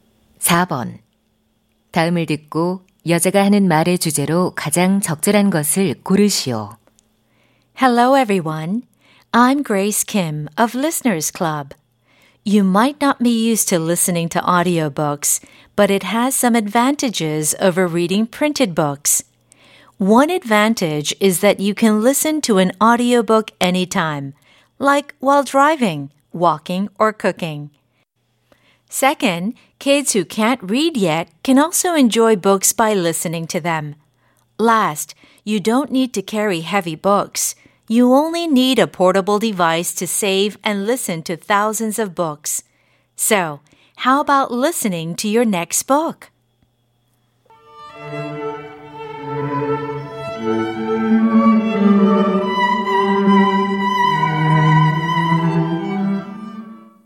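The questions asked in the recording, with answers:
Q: 다음을 듣고 여자가 하는 말의 주제로 가장 적절한 것을 고르시오.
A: 오디오북을 듣는 것의 장점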